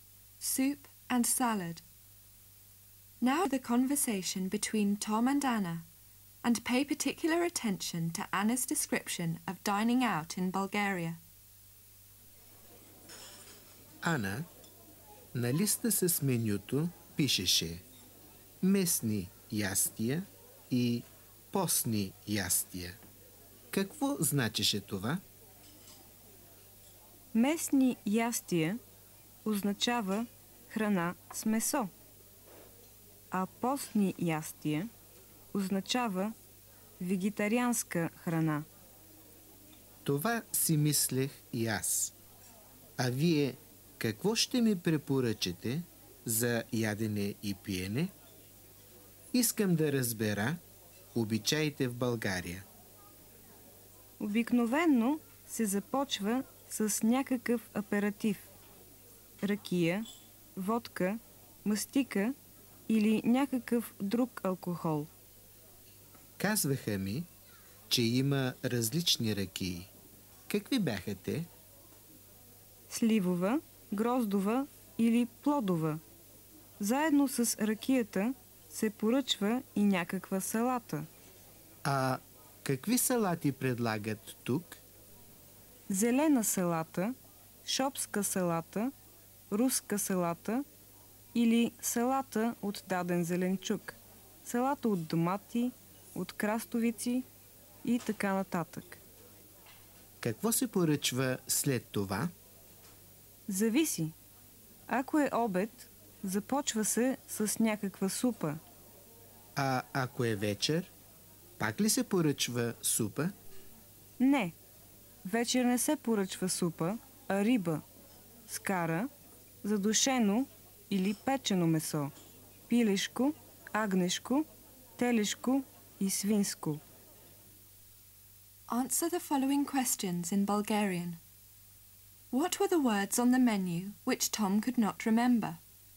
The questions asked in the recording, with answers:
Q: What were the words on the menu which Tom could not remember?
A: Местни ястия и постни ястия.